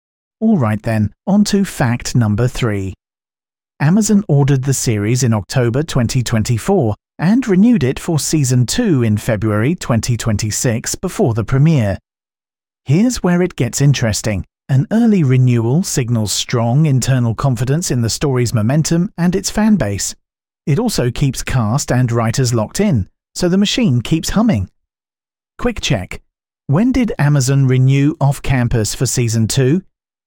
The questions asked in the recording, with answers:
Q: When did Amazon renew Off Campus for Season 2?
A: February 2026.